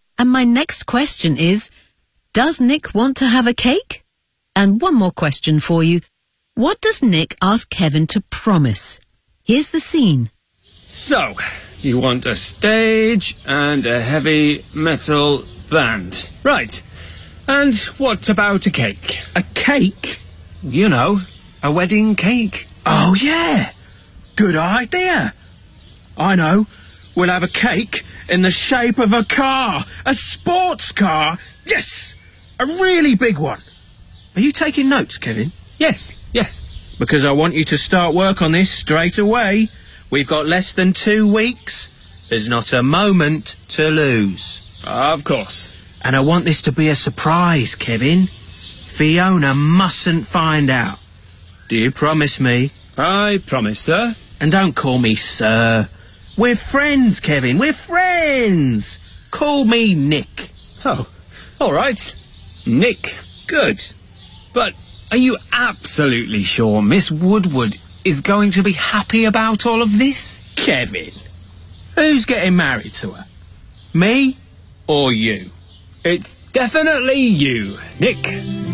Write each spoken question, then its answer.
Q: does Nick want to have a cake?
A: Yes, but not a traditional one.

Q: What does Nick ask Kevin to promise?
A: I want this to be a surprise, Kevin.